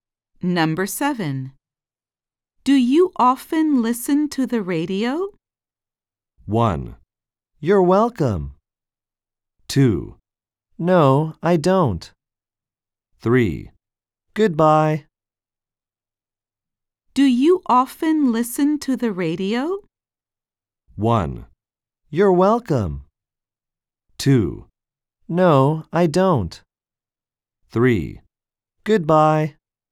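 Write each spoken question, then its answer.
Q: Do you often listen to the radio?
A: 2: No, I don't.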